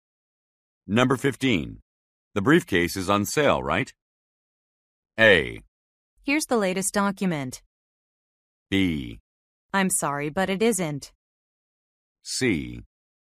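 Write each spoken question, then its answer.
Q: The briefcase is on sale, right?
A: B: I'm sorry, but it isn't.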